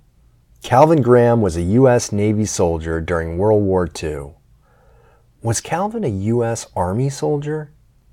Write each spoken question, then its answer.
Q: Was Calvin a U.S. Army soldier?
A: No, he wasn't a U.S. Army soldier.